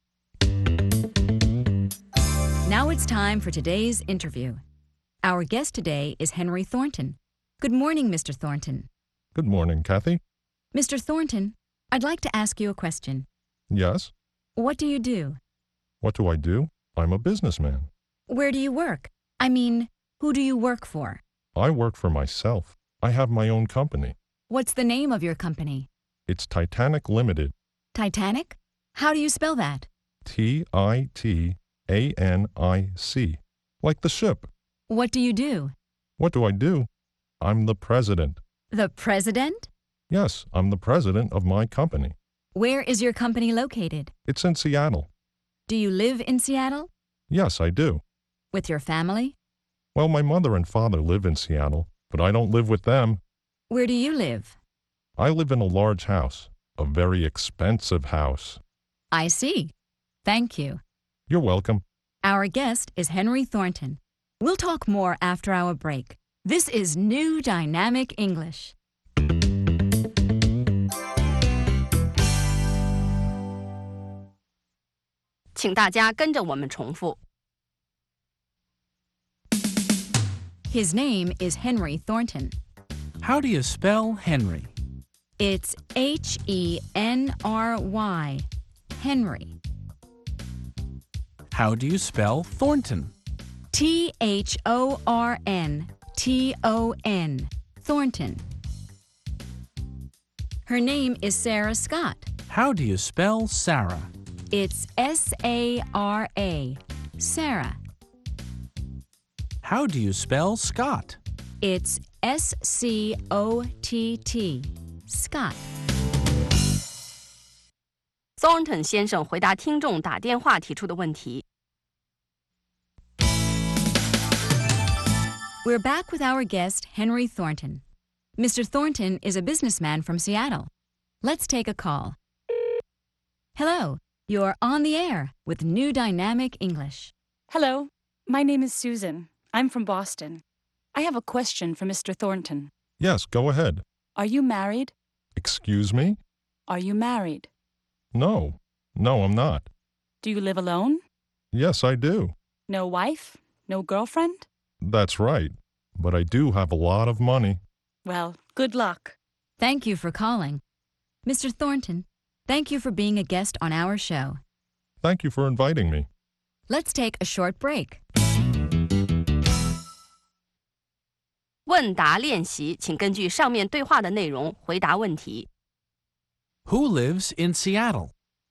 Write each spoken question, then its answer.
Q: Who lives in Seattle?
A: Henry Thornton lives in Seattle.